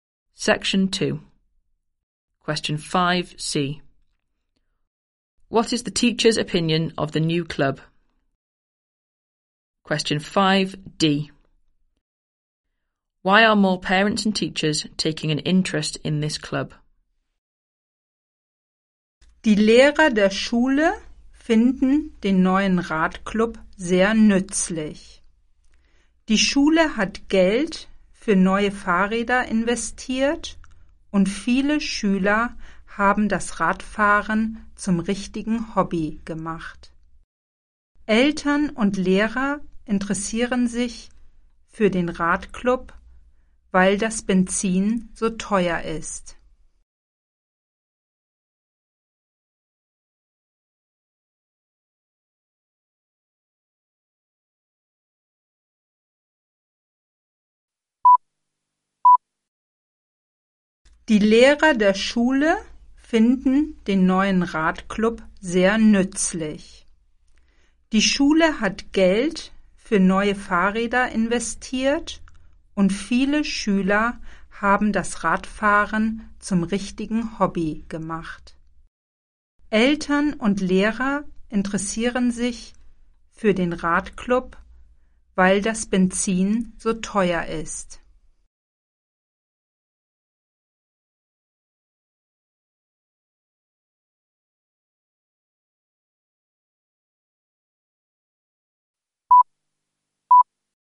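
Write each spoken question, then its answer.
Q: What is the teacher's opinion of the new club?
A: Very useful

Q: Why are more parents and teachers taking an interest in this club?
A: Because petrol is so expensive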